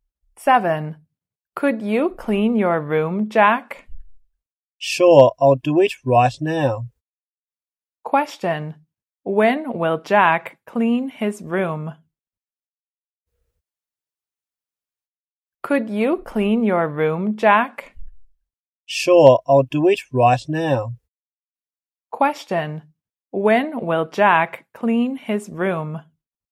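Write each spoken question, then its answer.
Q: when will Jack clean his room?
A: Right now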